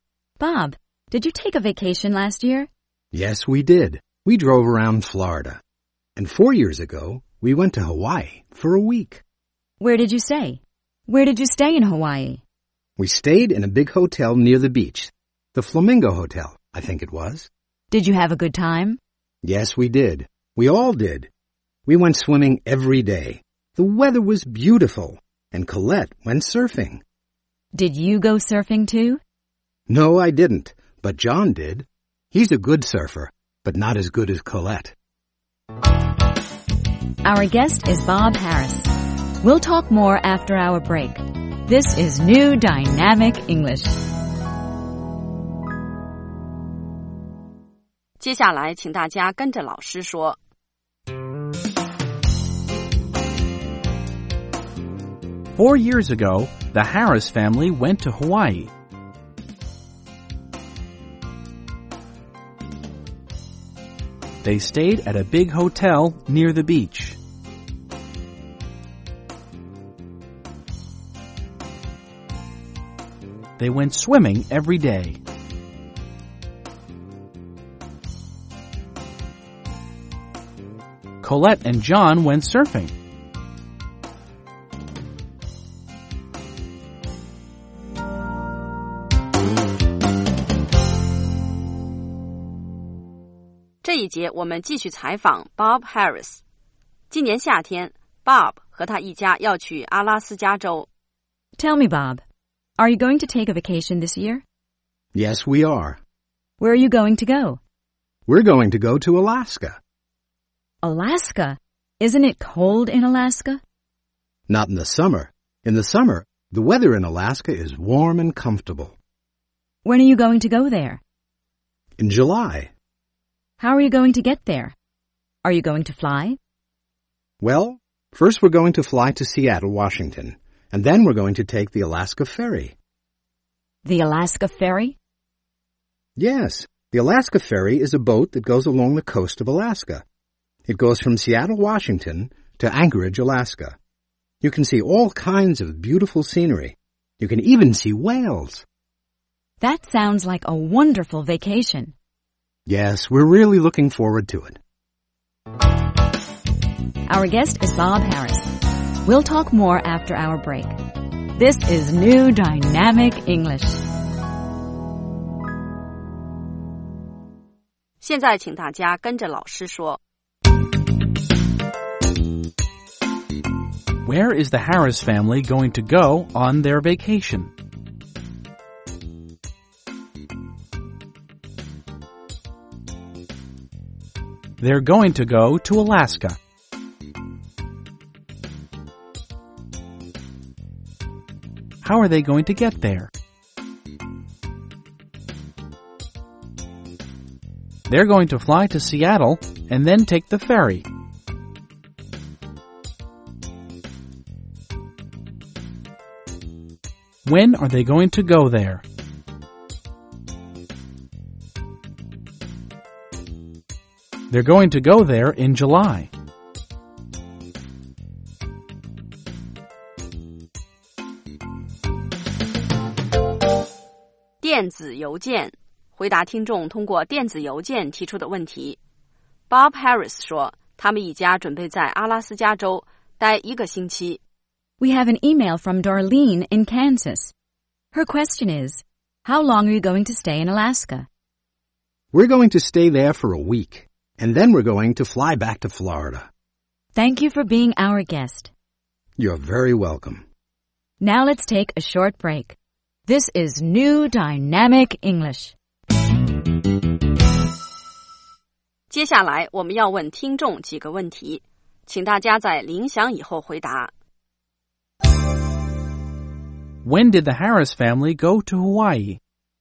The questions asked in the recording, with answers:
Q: When did the Harris family go to Hawaii?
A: They went there 4 years ago.